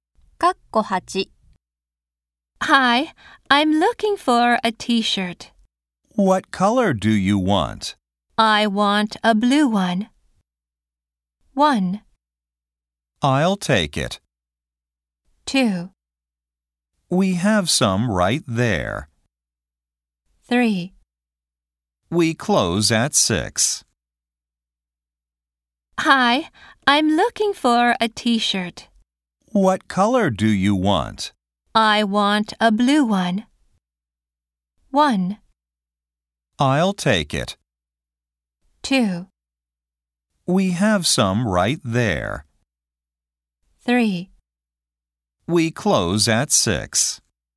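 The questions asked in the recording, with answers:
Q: I want a blue one.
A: 2: We have some right there.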